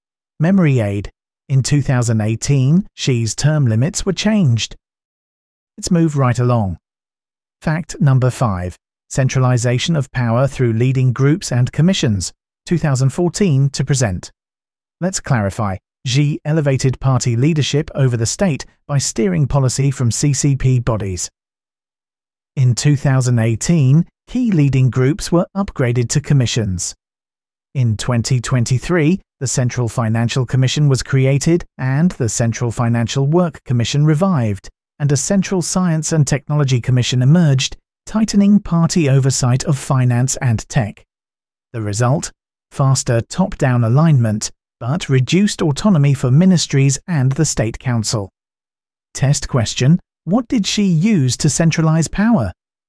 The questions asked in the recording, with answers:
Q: what did Xi use to centralize power?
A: Correct answer, leading groups and commissions.